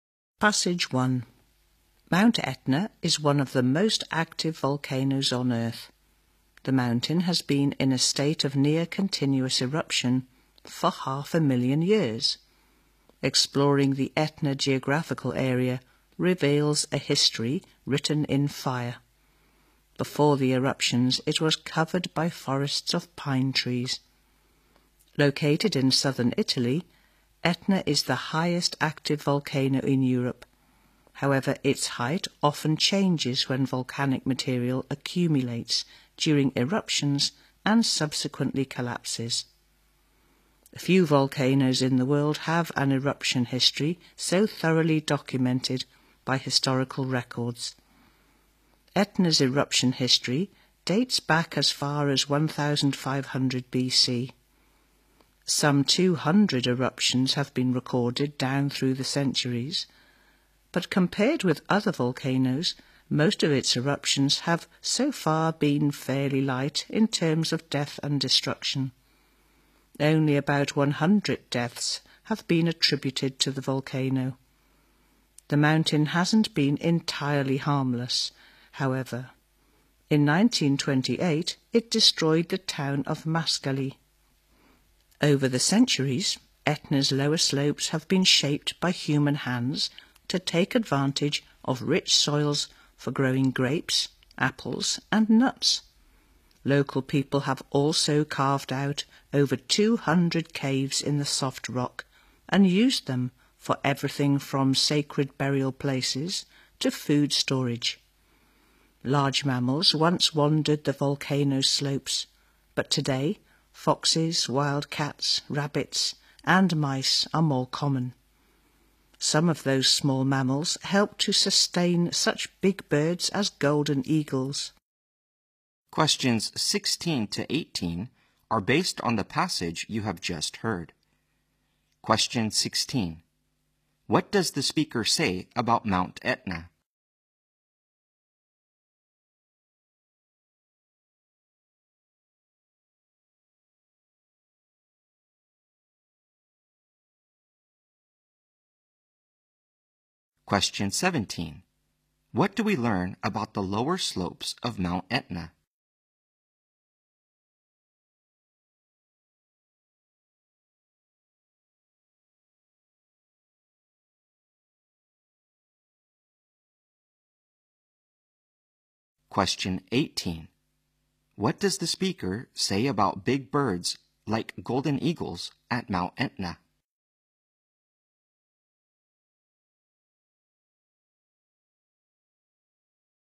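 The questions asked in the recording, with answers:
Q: What do we learn about the lower slopes of Mount Etna?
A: They have been shaped by people to use the rich soils for growing grapes, apples and nuts

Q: What does the speaker say about big birds like golden eagles at Mount Etna?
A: They are sustained by small mammals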